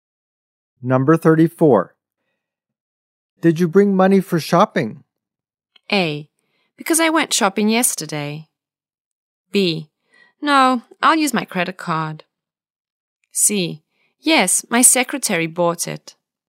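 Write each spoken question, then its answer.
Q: Did you bring money for shopping?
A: B: No, I'll use my credit card.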